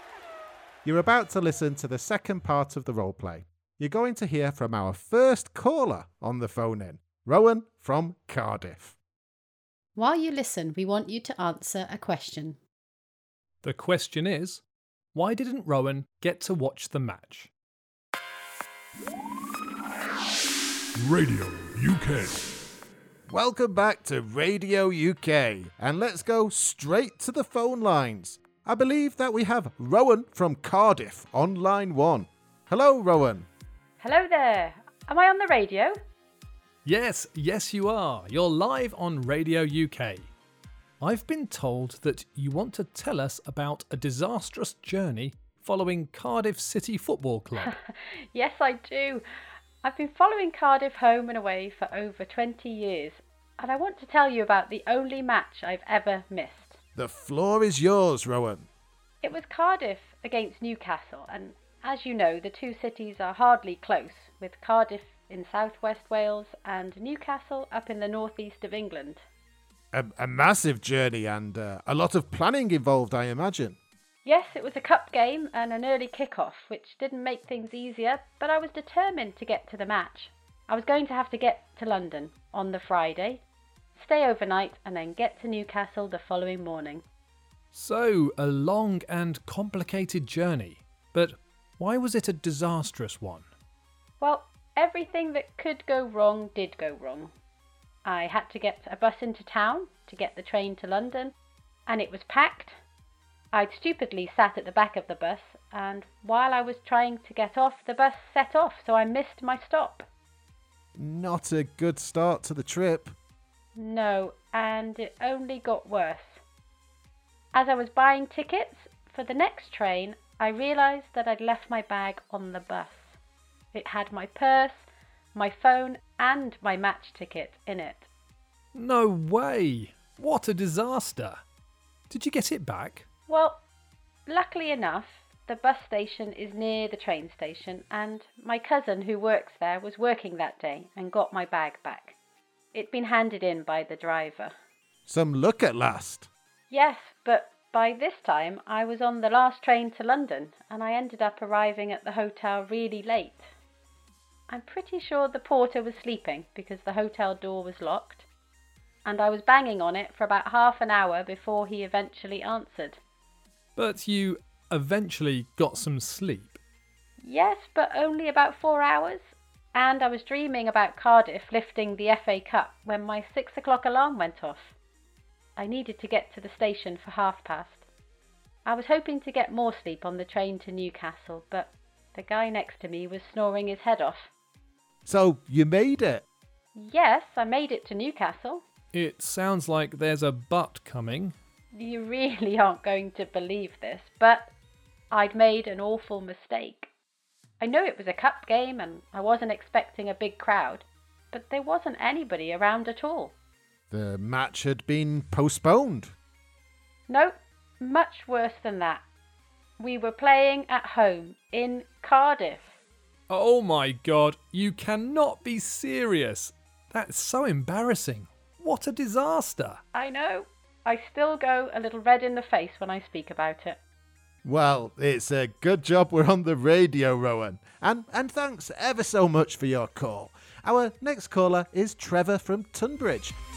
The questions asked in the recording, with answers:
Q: why didn't Rowan get to watch the match?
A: The match was in Cardiff and wasn't in Newcastle at all.